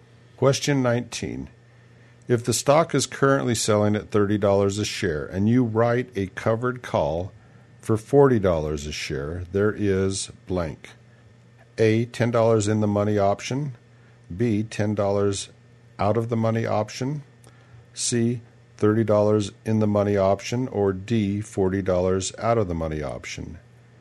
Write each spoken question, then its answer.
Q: If the stock is currently selling at $30 a share and you write a covered call for $40 a share, there is blank.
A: And the answer is B, $10 out of the money option.